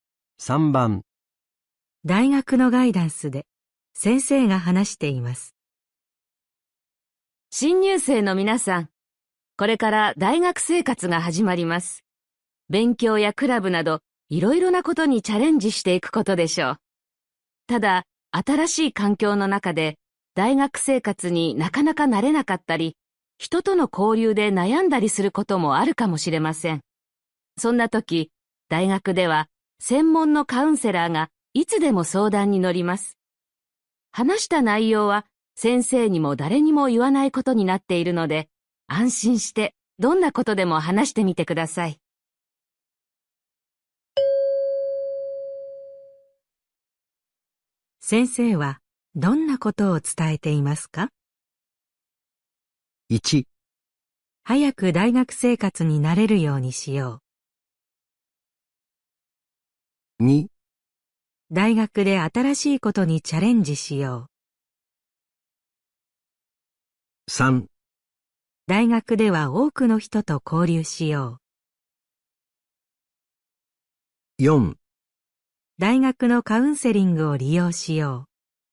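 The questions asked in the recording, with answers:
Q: 先生はどんなことを伝えていますか?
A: 4: 大学のカウンセリングを利用しよう。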